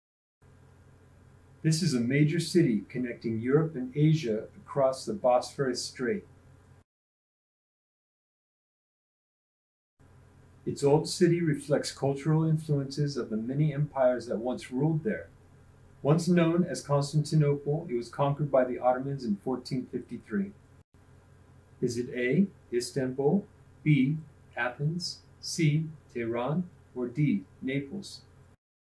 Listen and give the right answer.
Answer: If you chose Istanbul, you're correct.